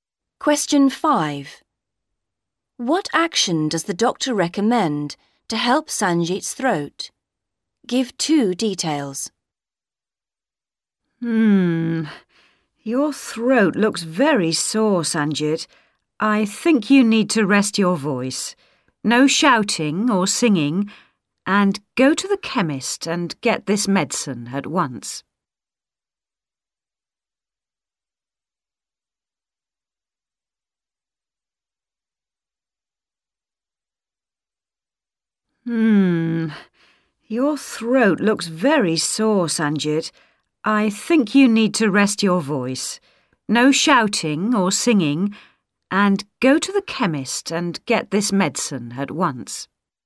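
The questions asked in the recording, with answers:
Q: What action does the doctor recommend to help Sanjit's throat?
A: Rest his voice (no shouting or singing) and get medicine from the chemist at once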